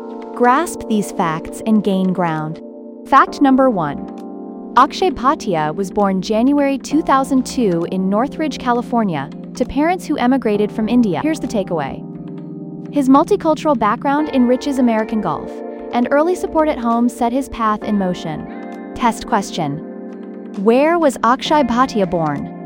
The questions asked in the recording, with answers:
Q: Where was Akshay Bhatia born?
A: Correct answer, Northridge, California.